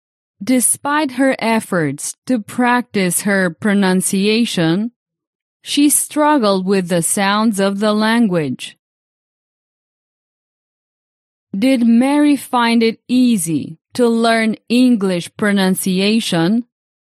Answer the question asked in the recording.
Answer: No, no. Mary didn't find it easy.